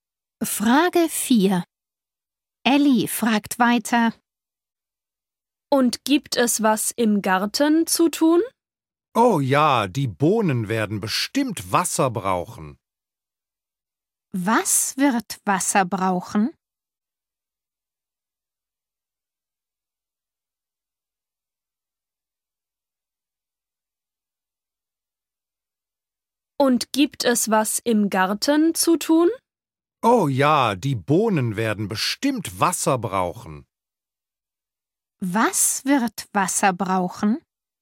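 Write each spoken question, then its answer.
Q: Was wird Wasser brauchen?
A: die Bohnen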